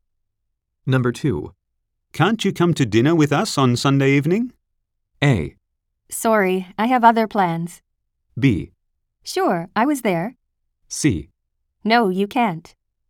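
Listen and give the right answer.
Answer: A: Sorry, I have other plans.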